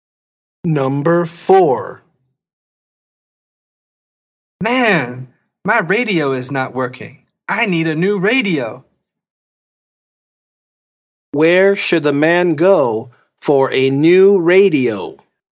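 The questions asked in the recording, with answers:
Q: Where should the man go for a new radio?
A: an electronics store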